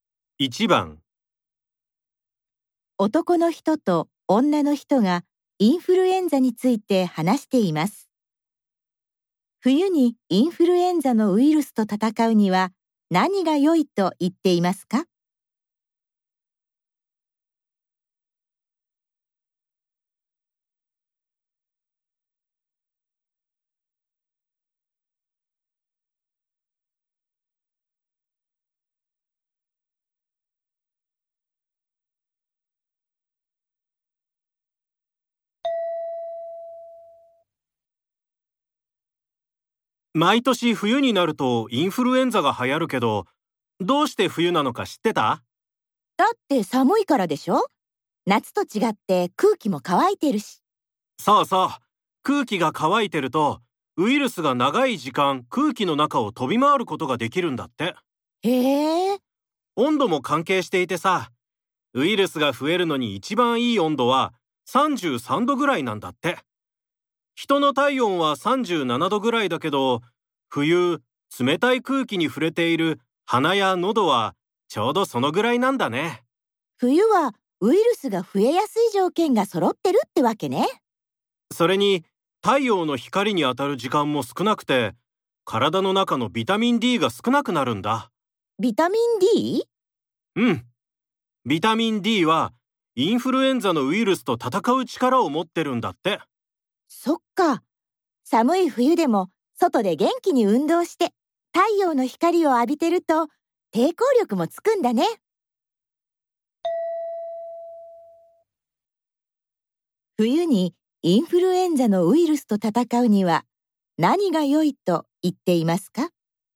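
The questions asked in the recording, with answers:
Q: 冬にインフルエンザのウイルスと戦うには何が良いと言っていますか?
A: 外で運動して太陽の光を浴びること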